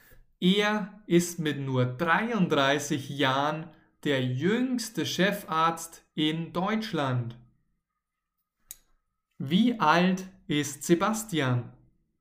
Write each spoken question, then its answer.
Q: Wie alt ist Sebastian?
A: Sebastian ist 33 Jahre.